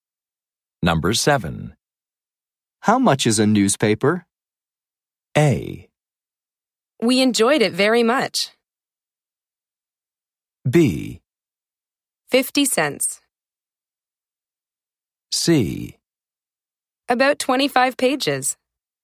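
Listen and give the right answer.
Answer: B: 50 cents.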